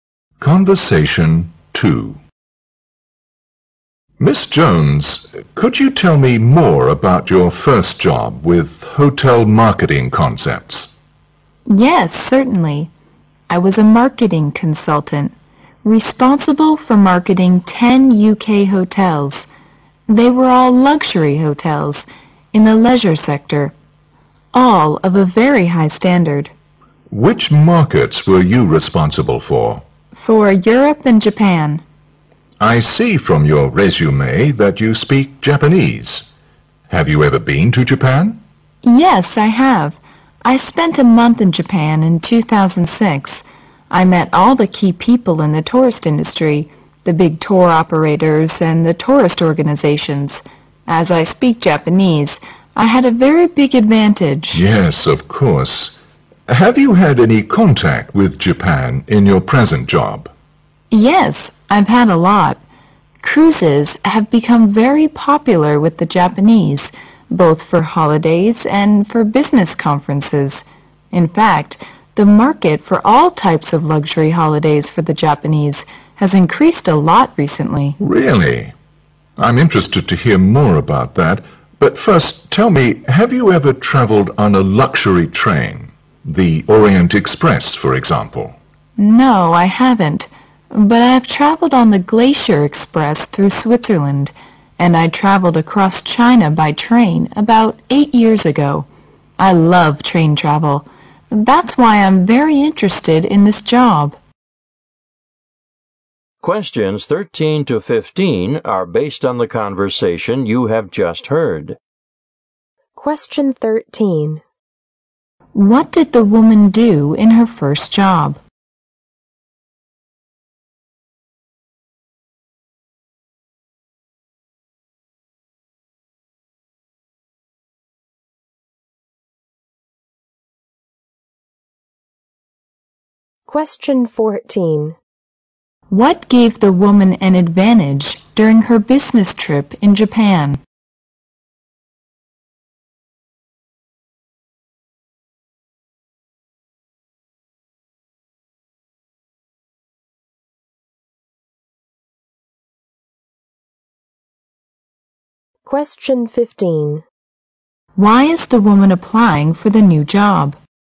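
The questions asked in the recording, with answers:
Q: What did the woman do in her first job?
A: She was a marketing consultant for 10 UK hotels

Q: What gave the woman an advantage during her business trip in Japan?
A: She speaks Japanese

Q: Why is the woman applying for the new job?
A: She loves train travel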